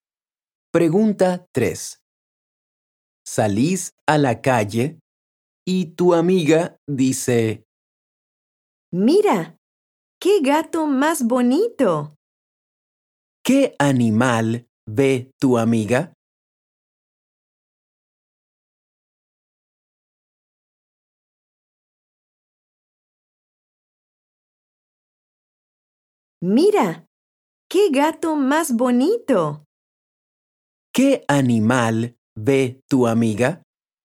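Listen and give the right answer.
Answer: un gato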